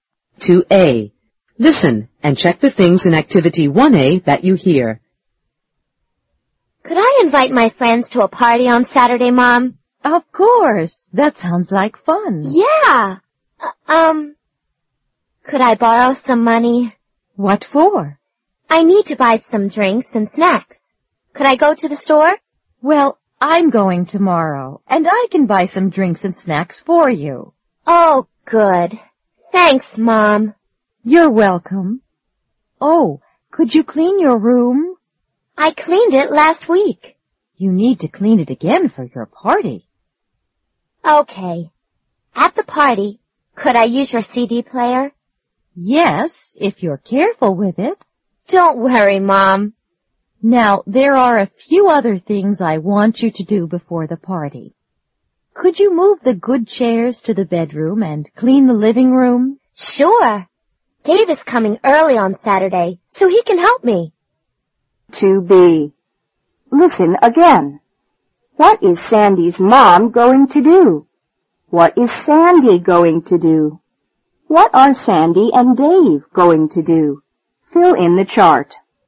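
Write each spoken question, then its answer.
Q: What is Sandy's mom going to do?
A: Go to the store and buy drinks and snacks

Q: What is Sandy going to do?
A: Clean her room

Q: What are Sandy and Dave going to do?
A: Move the good chairs to the bedroom and clean the living room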